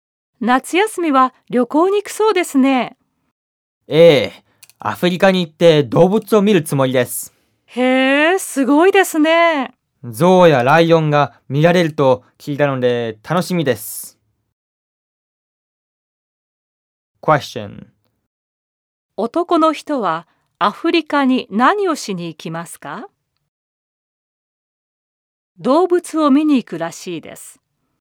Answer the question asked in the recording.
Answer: 動物を見に行くらしいです。